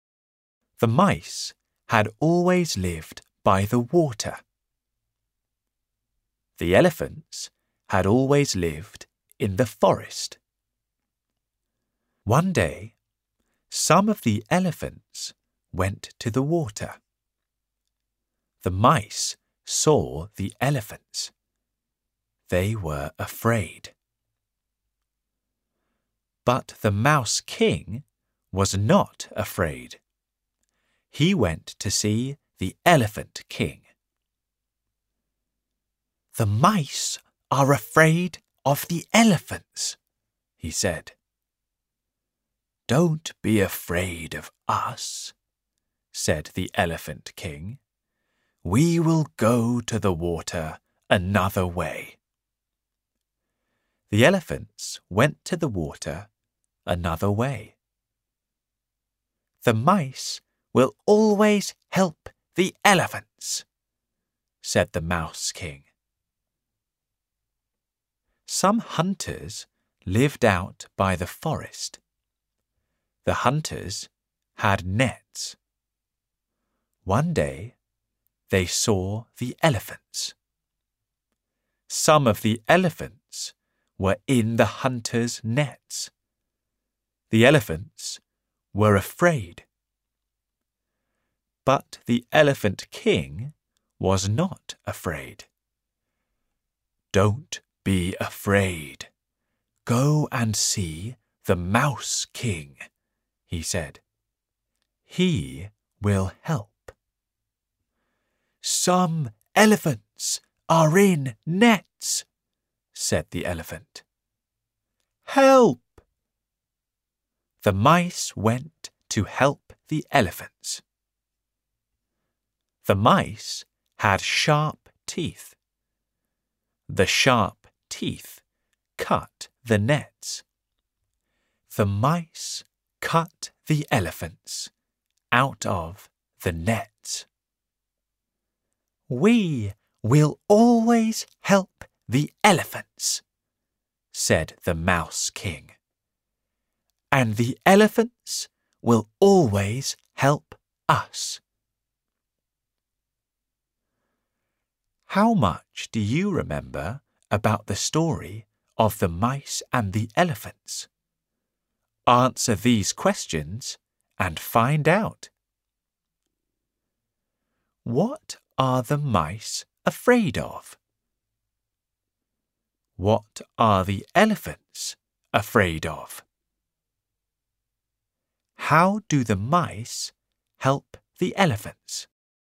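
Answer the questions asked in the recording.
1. The elephants
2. The hunters' nets
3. They cut the nets with their sharp teeth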